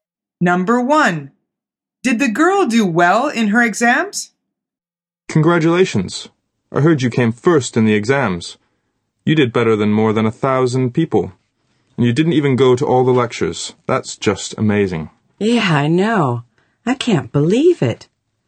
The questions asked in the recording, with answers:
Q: Did the girl do well in her exams?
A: The answer is yes, she did.